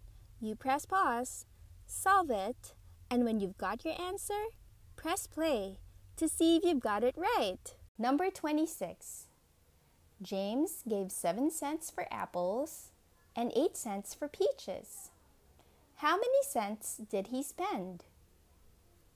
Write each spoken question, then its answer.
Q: How many cents did he spend?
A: He spent 7 cents and 8 cents, which make 15 cents.